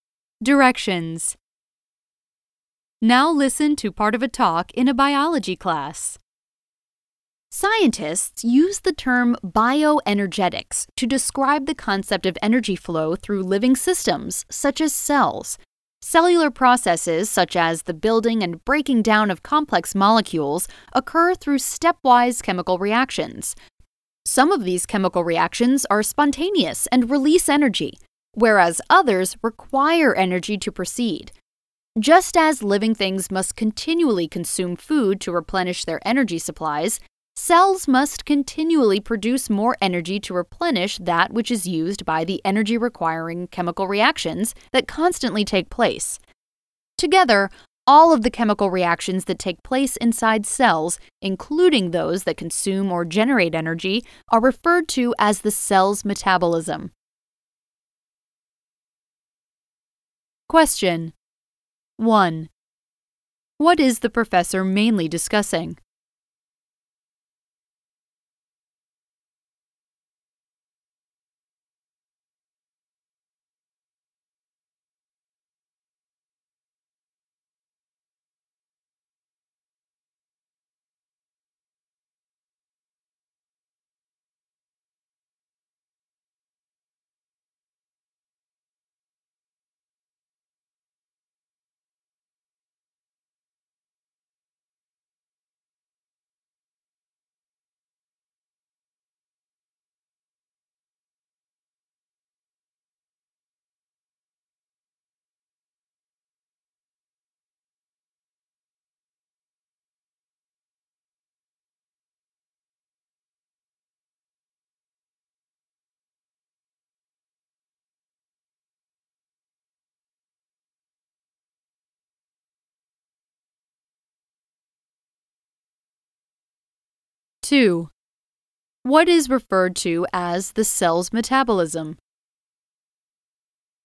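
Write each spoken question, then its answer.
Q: What is the professor mainly discussing?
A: Bioenergetics: how energy flows through living systems such as cells

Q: What is referred to as the cell's metabolism?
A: All of the chemical reactions that take place inside cells, including those that consume or generate energy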